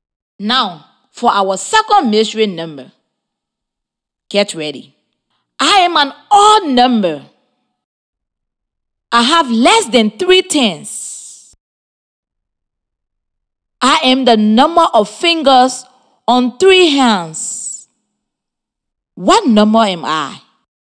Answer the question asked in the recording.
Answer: The mystery number is 15.